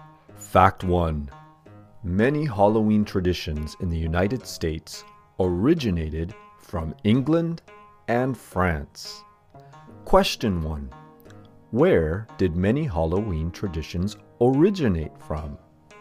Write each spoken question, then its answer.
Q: Where did many Halloween traditions originate from?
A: Many Halloween traditions in the United States originated from England and France.